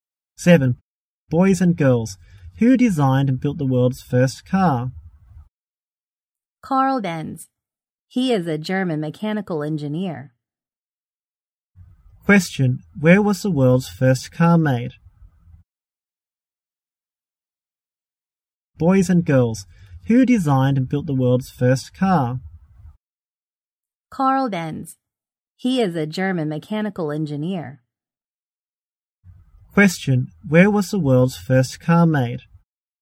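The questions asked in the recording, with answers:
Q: Where was the world's first car made?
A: In Germany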